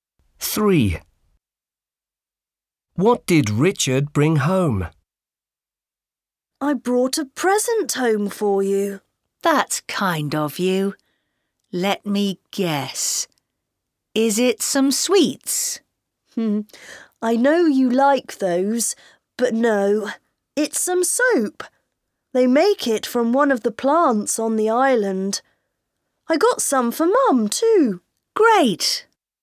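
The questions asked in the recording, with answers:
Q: What did Richard bring home?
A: Some soap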